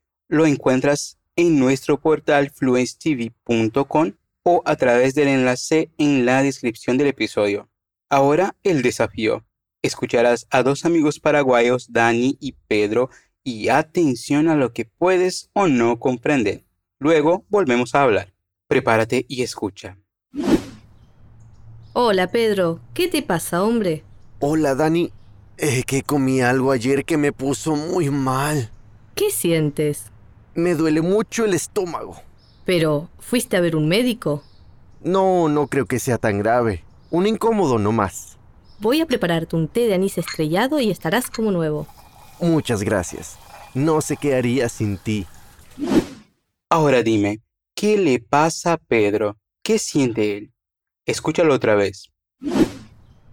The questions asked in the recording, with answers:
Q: Ahora dime, ¿qué le pasa a Pedro?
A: Es que comí algo ayer que me puso muy mal.